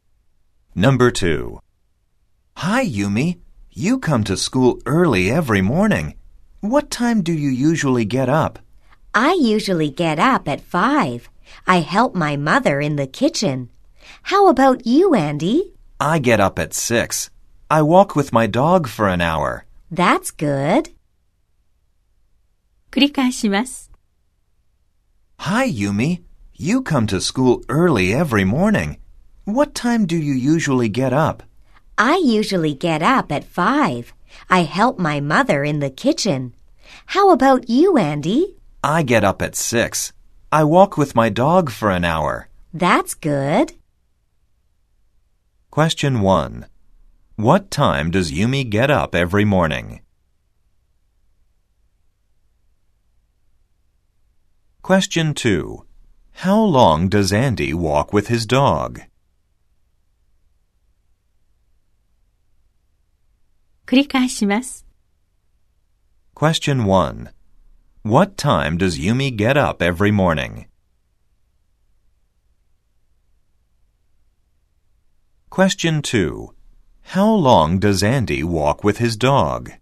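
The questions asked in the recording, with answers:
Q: What time does Yumi get up every morning?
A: She gets up at 5.

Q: How long does Andy walk with his dog?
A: For an hour.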